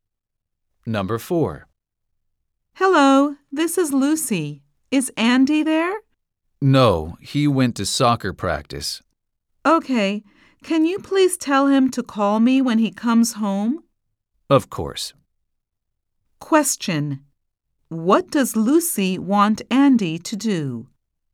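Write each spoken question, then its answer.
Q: What does Lucy want Andy to do?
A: Call her when he comes home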